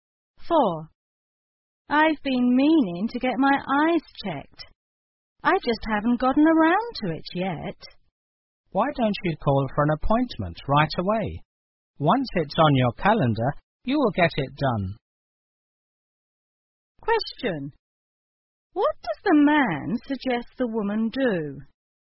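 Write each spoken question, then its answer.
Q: What does the man suggest the woman do?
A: Call right away to make an appointment for an eye check.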